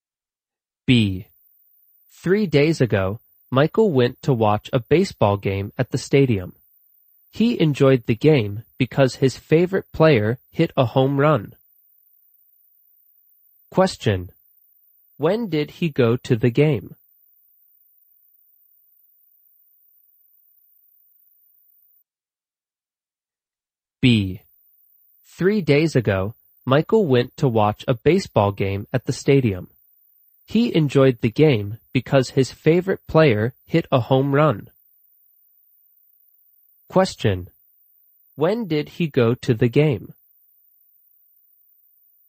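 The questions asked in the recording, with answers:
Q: When did he go to the game?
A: 3 days ago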